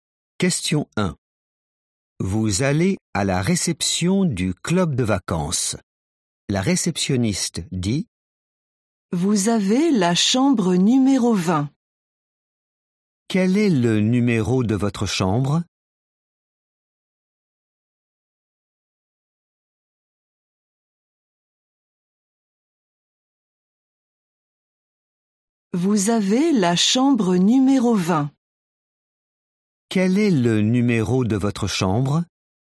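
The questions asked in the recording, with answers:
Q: Quel est le numéro de votre chambre ?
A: 20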